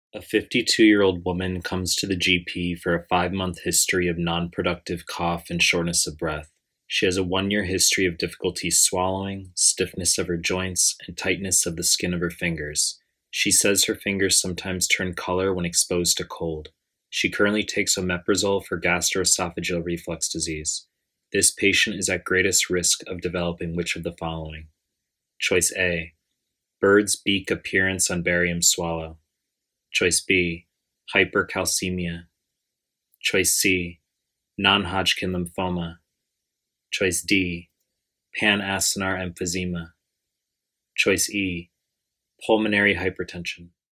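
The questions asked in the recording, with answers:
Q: This patient is at greatest risk of developing which of the following?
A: E: pulmonary hypertension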